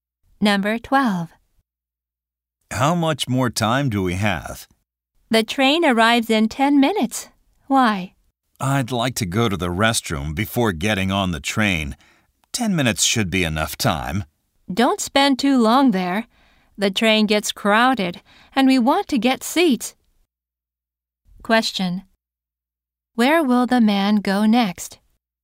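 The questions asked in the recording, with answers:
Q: Question. Where will the man go next?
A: To the restroom.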